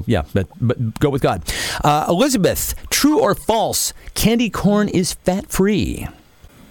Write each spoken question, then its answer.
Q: Elizabeth, true or false, candy corn is fat-free?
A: It is true.